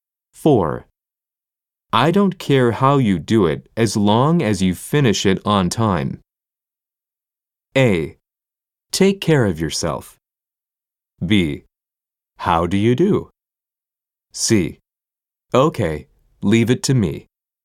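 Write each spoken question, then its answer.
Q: I don't care how you do it as long as you finish it on time.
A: C: Okay, leave it to me.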